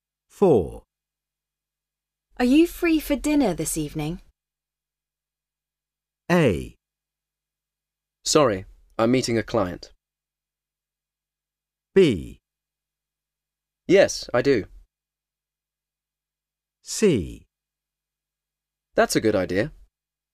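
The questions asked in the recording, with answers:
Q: Are you free for dinner this evening?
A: A: Sorry, I'm meeting a client.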